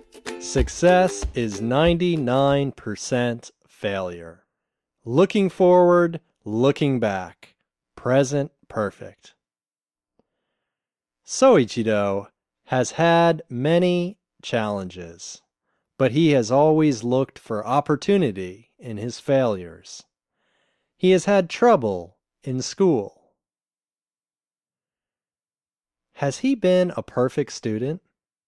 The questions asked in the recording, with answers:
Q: Has he been a perfect student?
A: No, he hasn't been a perfect student.